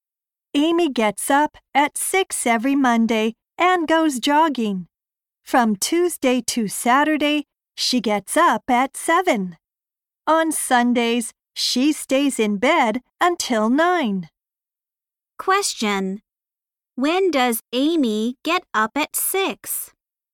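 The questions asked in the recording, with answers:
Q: When does Amy get up at 6?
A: On Mondays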